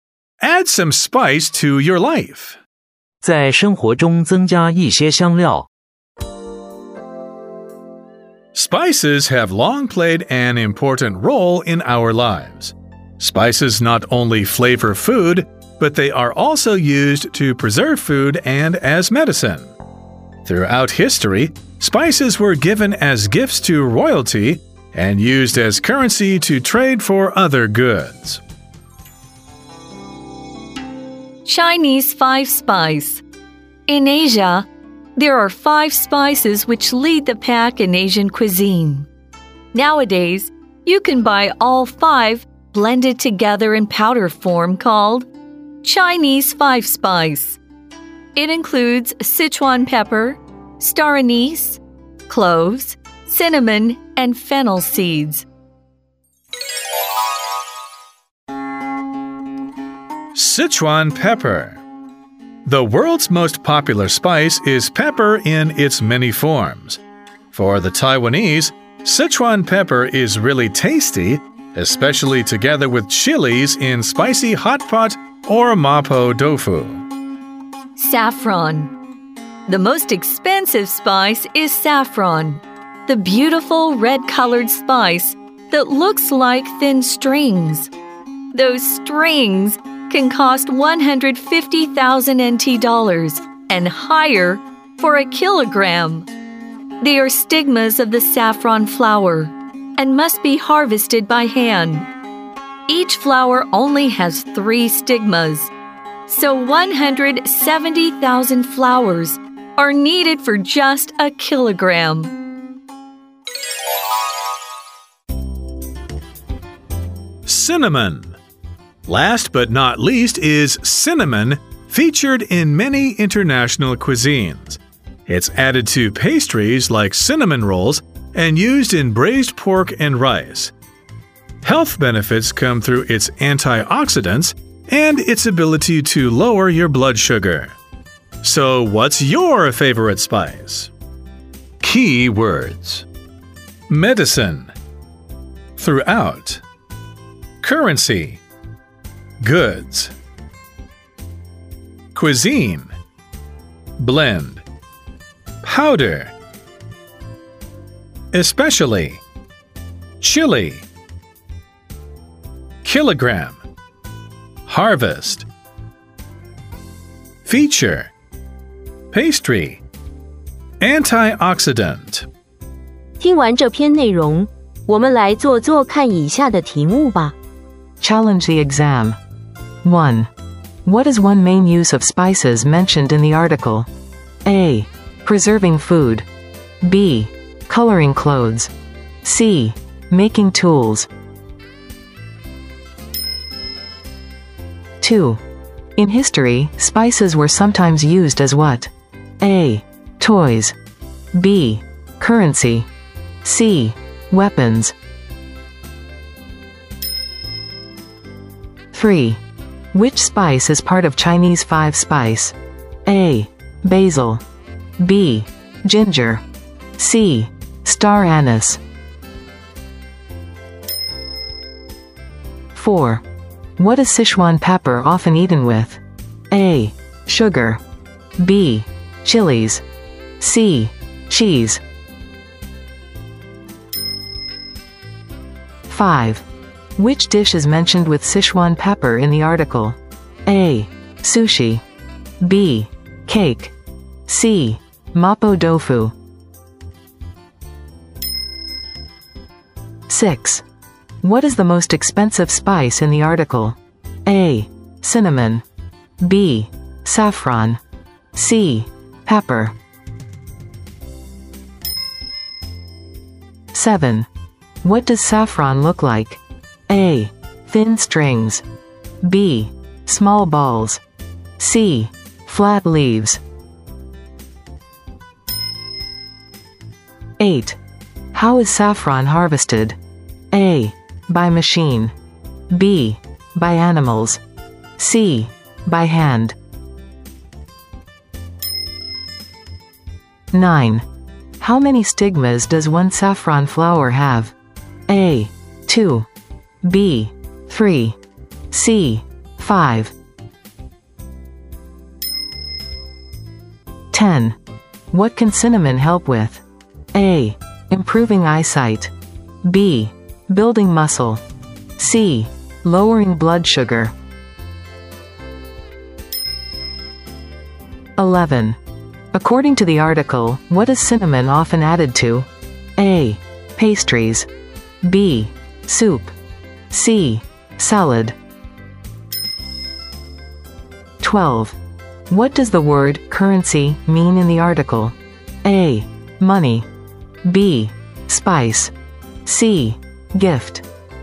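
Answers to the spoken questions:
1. A: Preserving food
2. B: Currency
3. C: Star anise
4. B: Chilies
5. C: Mapo tofu
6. B: Saffron
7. A: Thin strings
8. C: By hand
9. B: 3
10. C: Lowering blood sugar
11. A: Pastries
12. A: Money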